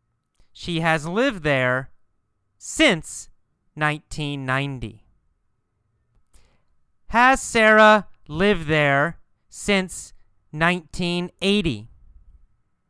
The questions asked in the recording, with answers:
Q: Has Sarah lived there since 1980?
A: No, no, not since 1980.